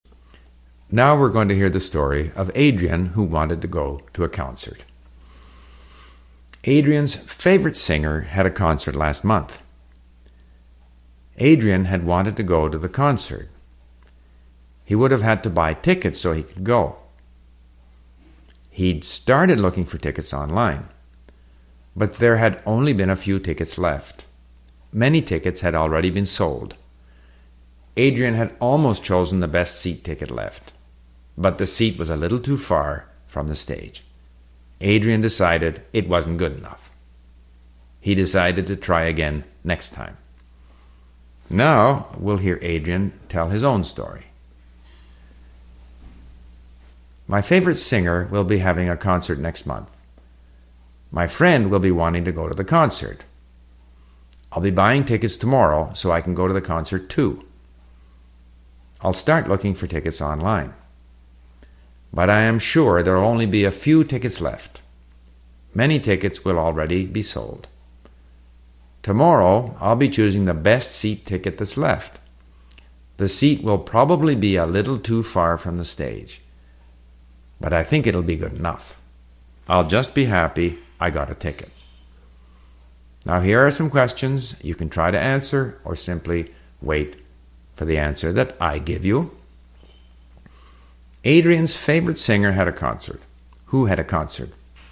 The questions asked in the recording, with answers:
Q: Who had a concert?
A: Adrian's favorite singer had a concert.